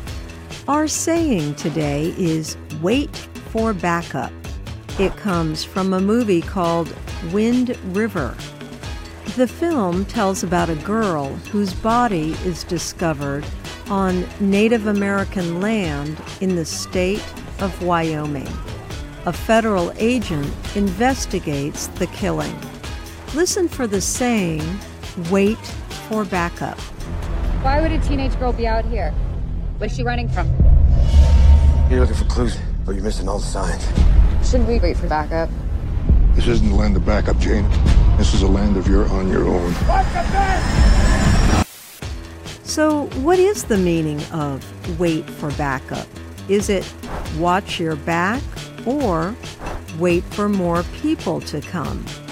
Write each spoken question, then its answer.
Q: So, what is the meaning of wait for backup? Is it watch your back or wait for more people to come?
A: Wait for backup means wait for more people to come.